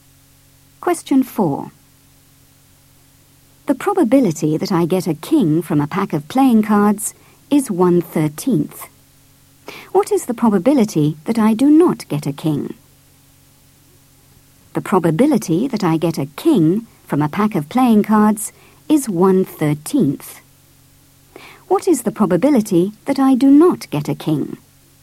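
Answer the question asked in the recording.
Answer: 12/13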